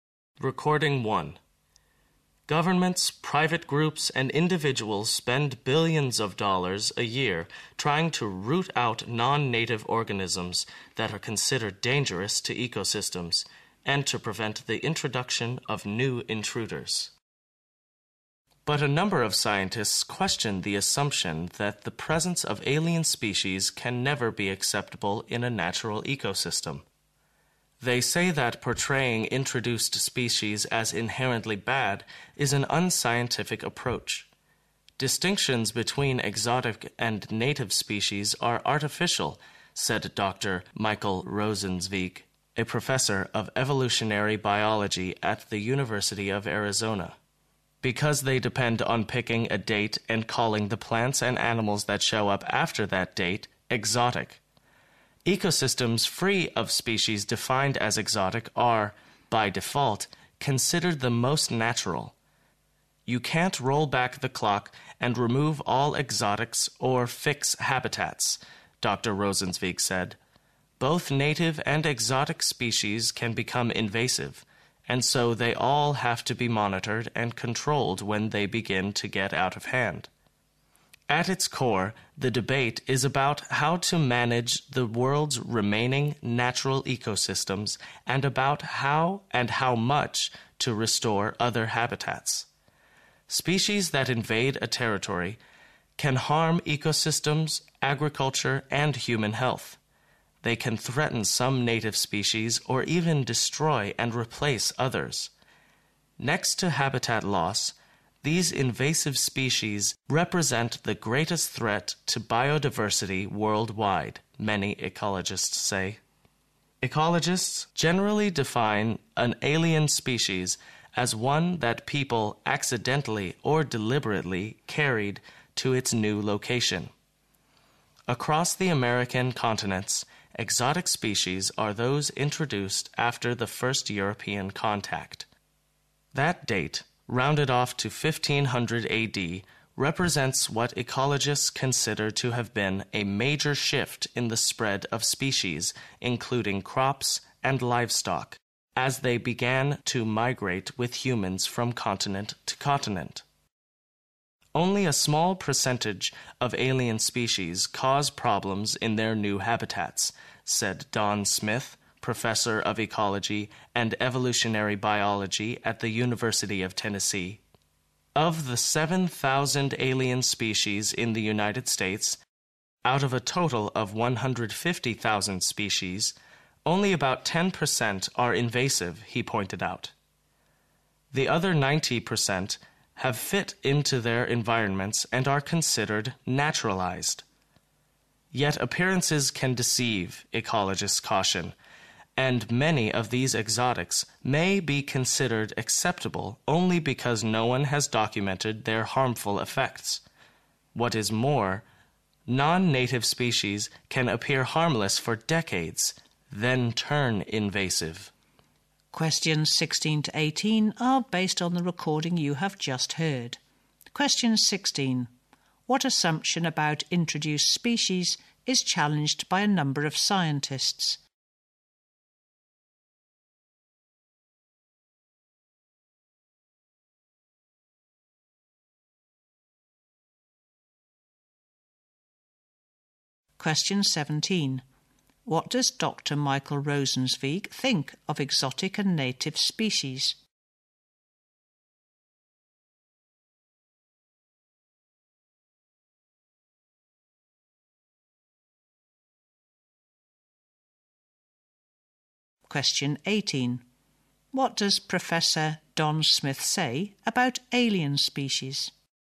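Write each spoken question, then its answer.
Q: What assumption about introduced species is challenged by a number of scientists?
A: That the presence of alien species can never be acceptable in a natural ecosystem

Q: What does Dr. Michael Rosenzweig think of exotic and native species?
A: The distinction between them is artificial

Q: What does Professor Don Smith say about alien species?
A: Only a small percentage of them cause problems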